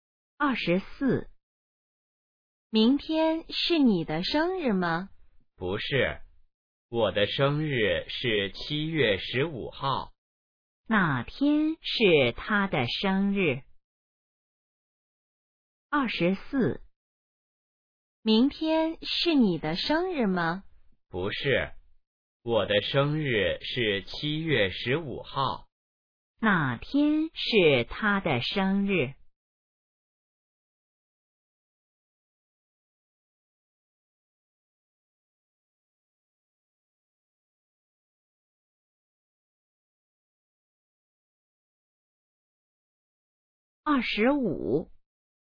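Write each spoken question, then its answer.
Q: 哪天是他的生日?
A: 七月十五号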